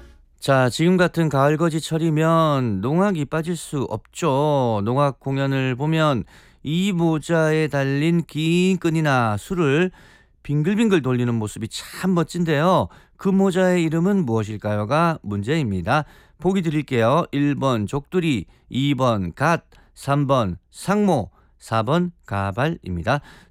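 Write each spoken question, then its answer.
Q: 그 모자의 이름은 무엇일까요가 문제입니다.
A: 3: 상모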